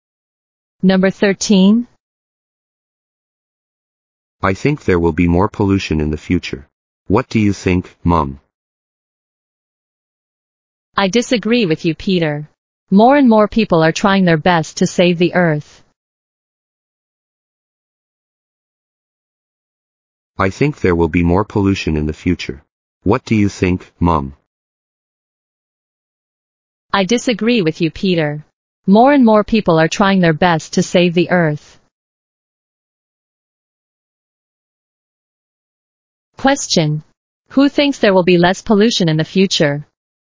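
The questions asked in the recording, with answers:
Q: Who thinks there will be less pollution in the future?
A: Peter's mom.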